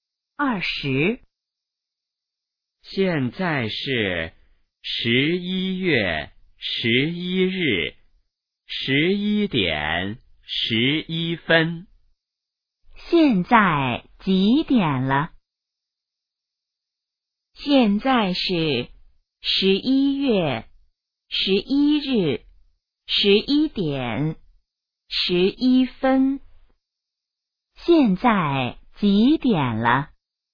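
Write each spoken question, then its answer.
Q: 现在几点了?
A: 11:11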